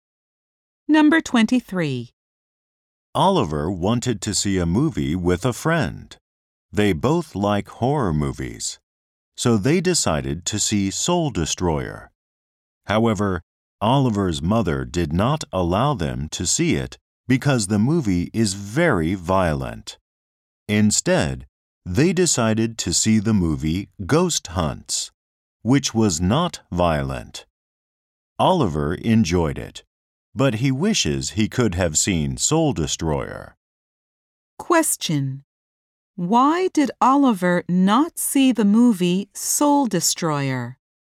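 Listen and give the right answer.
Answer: His mother did not allow it because it is very violent.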